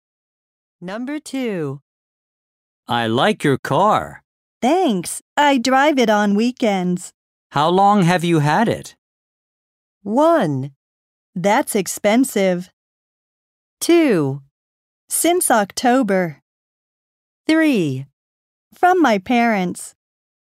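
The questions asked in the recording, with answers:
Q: How long have you had it?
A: 2: Since October.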